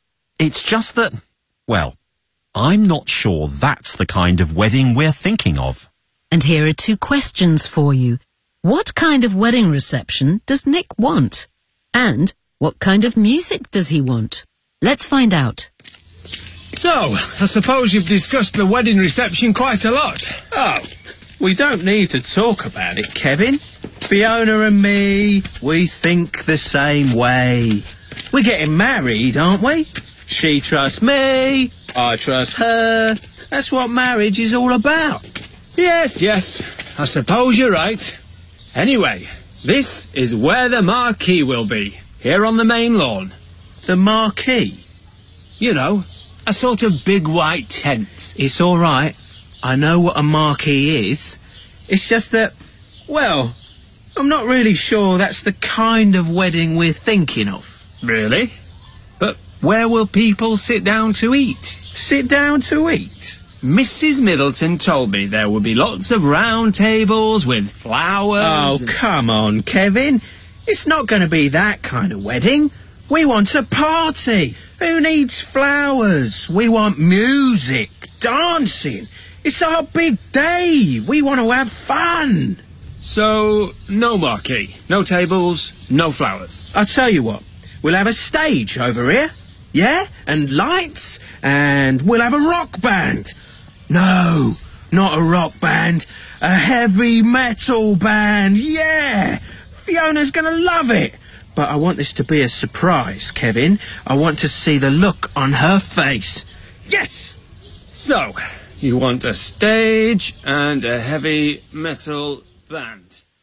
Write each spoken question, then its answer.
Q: What kind of wedding reception does Nick want?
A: We want a party. Who needs flowers?

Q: And what kind of music does he want?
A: No, not a rock band, a heavy metal band.